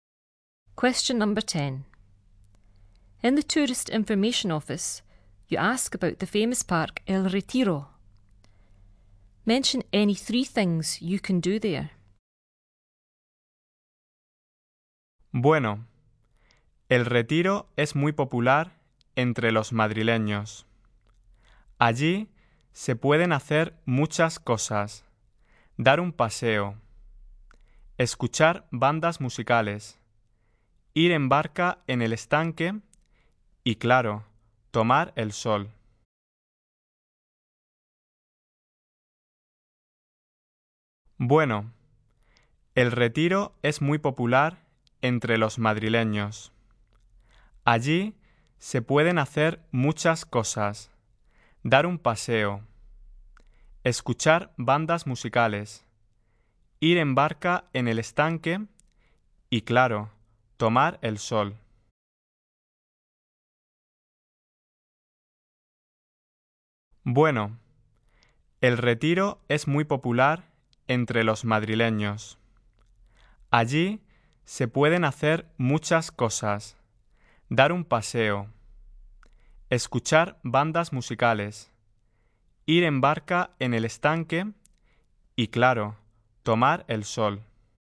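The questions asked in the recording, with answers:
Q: Mention any three things you can do there.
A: Any three of: go for a walk, listen to bands, go boating on the lake, sunbathe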